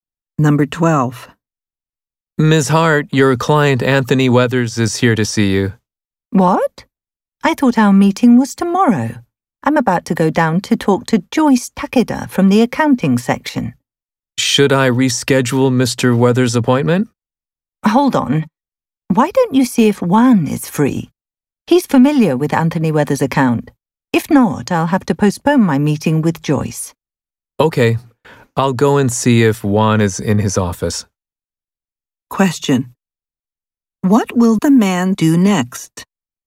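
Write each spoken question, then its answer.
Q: What will the man do next?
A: Go and see if Juan is in his office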